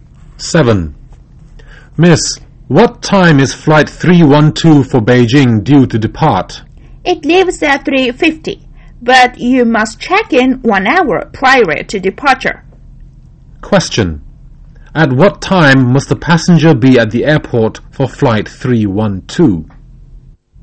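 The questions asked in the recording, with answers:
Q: At what time must the passenger be at the airport for flight 312?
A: 2:50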